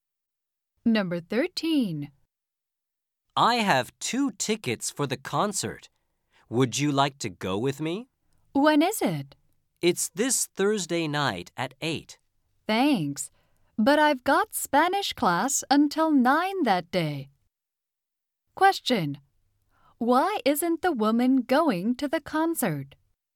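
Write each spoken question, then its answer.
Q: Why isn't the woman going to the concert?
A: She has Spanish class until 9 that day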